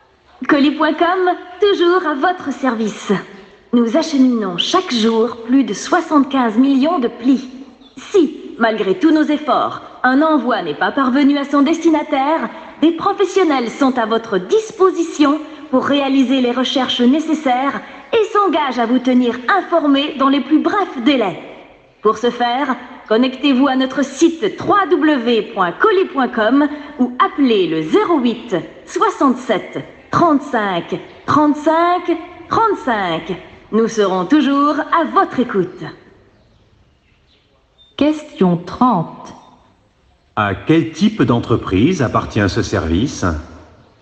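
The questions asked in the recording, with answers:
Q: À quel type d'entreprise appartient ce service ?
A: Une entreprise de livraison de colis et de courrier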